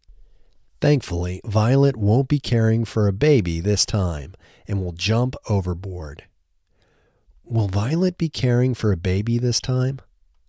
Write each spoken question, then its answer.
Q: Will Violet be caring for a baby this time?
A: No, thankfully, Violet won't be caring for a baby this time.